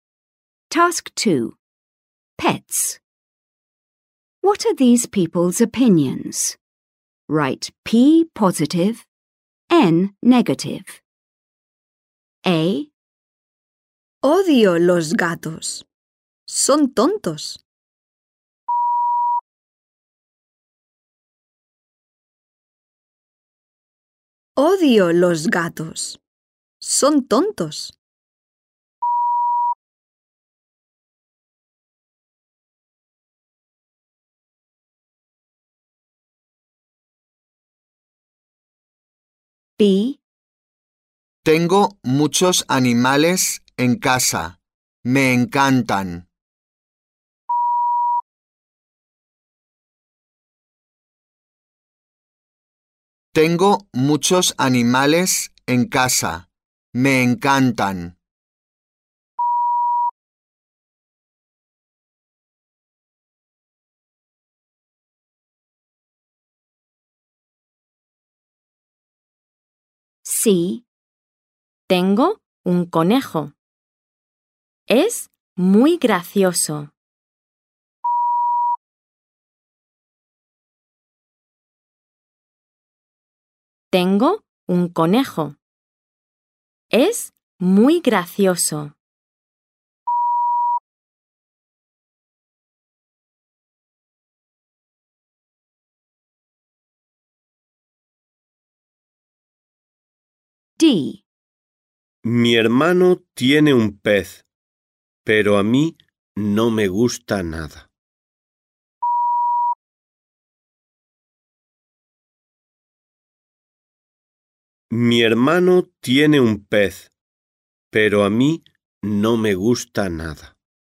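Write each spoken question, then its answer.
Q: What are these people's opinions?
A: N (negative)

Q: What are these people's opinions?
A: P (positive)

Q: What are these people's opinions?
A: P (positive)

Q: What are these people's opinions?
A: N (negative)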